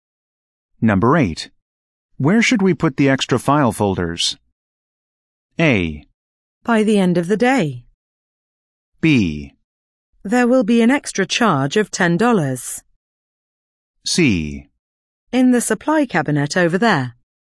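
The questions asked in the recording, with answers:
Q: Where should we put the extra file folders?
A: C: In the supply cabinet over there.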